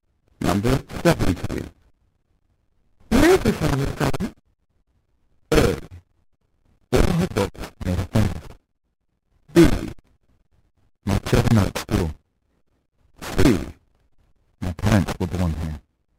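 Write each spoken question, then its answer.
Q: Where is your family from?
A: C: My parents were born here.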